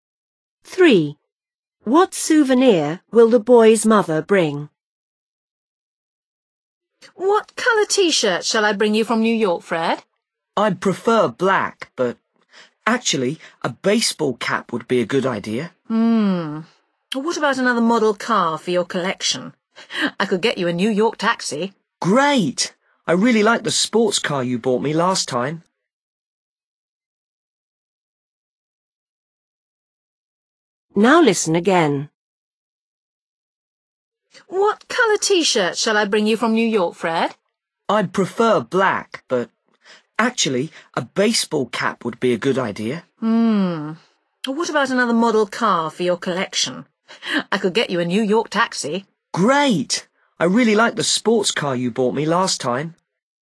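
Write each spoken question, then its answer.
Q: What souvenir will the boy's mother bring?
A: a model New York taxi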